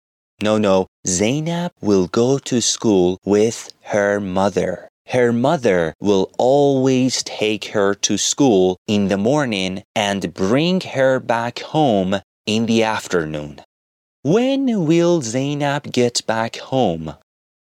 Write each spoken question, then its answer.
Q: When will Zainab get back home?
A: Bravo! Zainab will get back home in the afternoon.